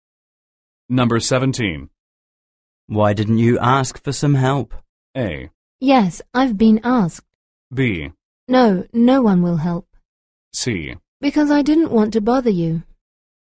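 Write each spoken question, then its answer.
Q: Why didn't you ask for some help?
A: C: Because I didn't want to bother you.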